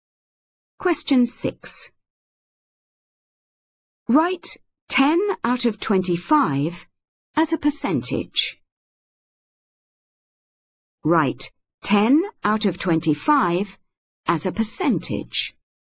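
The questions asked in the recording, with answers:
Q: Write 10 out of 25 as a percentage.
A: 40%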